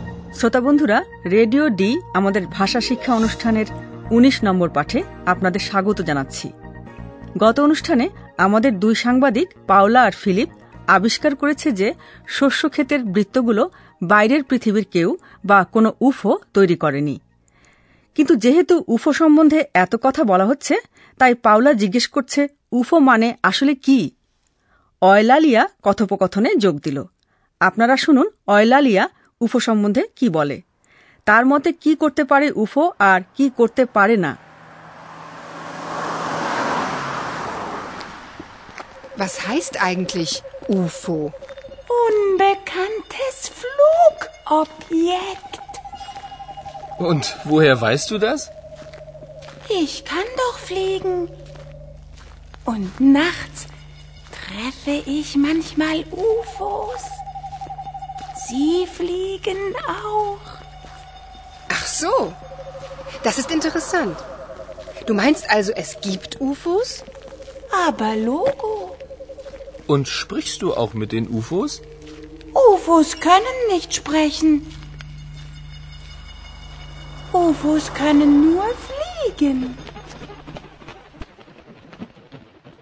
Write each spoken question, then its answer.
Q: আপনারা শুনুন Eulalia উফো সম্বন্ধে কি বলে তার মতে কি করতে পারে উফো আর কি করতে পারে না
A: একটা জিনিস যে উফোরা করতে পারে না সে ব্যাপারে Eulalia নিশ্চিত এবং তা হল কথা বলা স্প্রেখেন